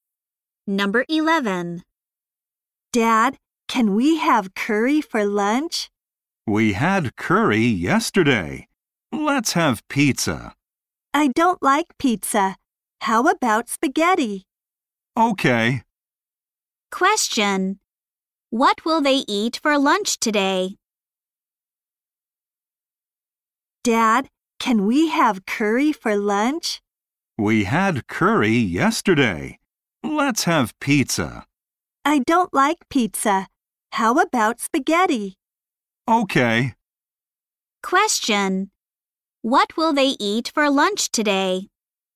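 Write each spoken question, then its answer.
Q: What will they eat for lunch today?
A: Spaghetti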